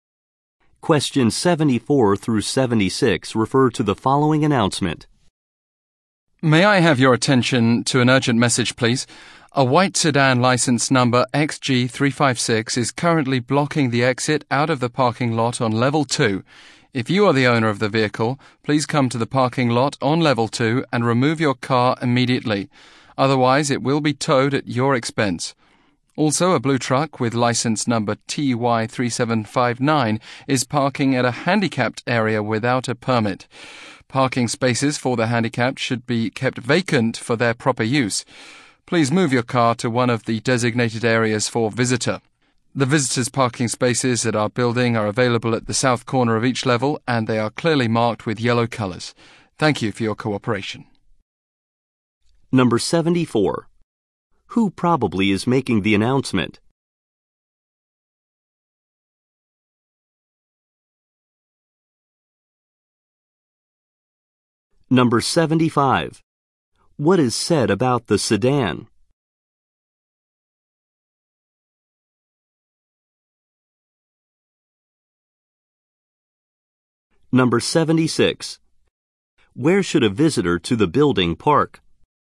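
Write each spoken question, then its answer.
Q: What is said about the sedan?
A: It is blocking the exit of the parking lot on level 2

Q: Where should a visitor to the building park?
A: At the south corner of each level, in spaces marked in yellow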